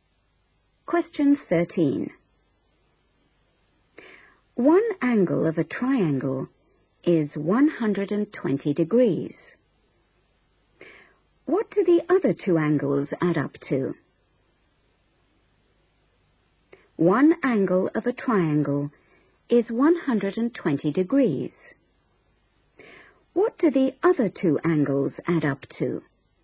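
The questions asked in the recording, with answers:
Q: What do the other two angles add up to?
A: 60 degrees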